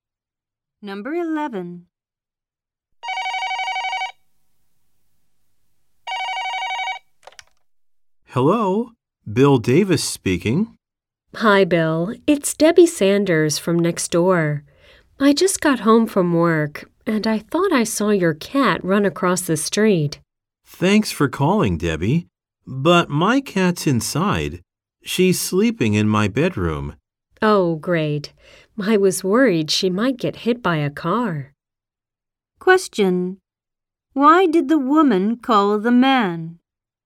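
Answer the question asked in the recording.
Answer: She thought she saw his cat run across the street.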